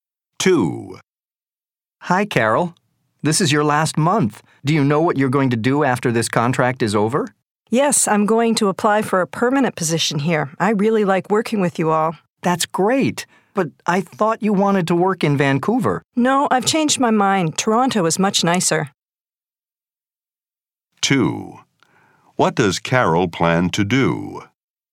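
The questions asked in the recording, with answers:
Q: What does Carol plan to do?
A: Apply for a permanent position in Toronto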